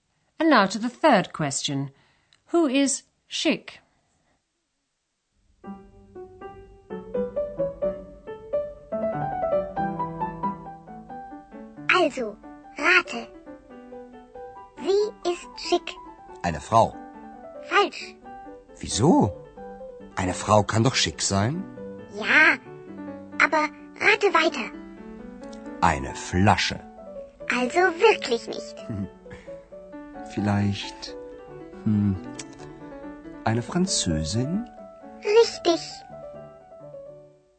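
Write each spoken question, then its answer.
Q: Who is Schick?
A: A French woman (eine Französin)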